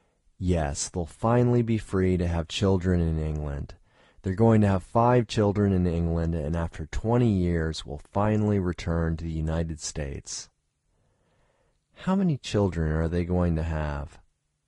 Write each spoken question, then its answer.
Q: How many children are they going to have?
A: They are going to have 5 children.